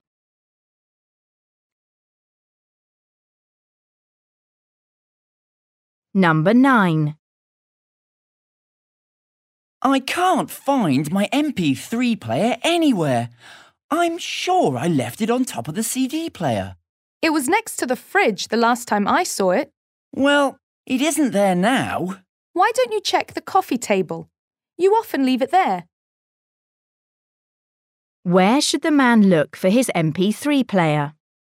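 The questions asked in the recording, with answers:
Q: Where should the man look for his MP3 player?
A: on the coffee table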